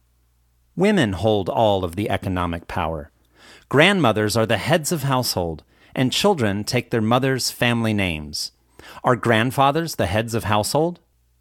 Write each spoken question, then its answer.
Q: Are grandfathers the heads of household?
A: No, they aren't. Grandmothers are the heads of household.